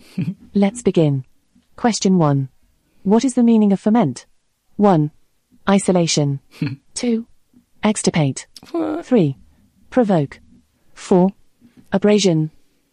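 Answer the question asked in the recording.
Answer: 3: Provoke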